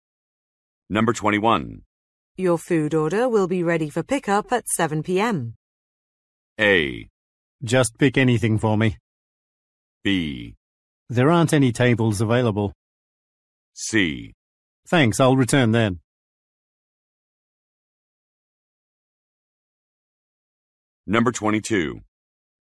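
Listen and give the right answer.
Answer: C: Thanks, I'll return then.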